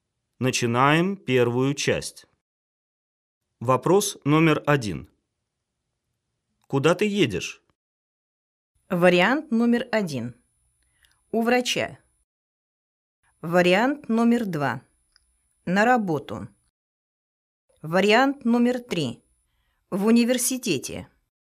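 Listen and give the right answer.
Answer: 2: На работу.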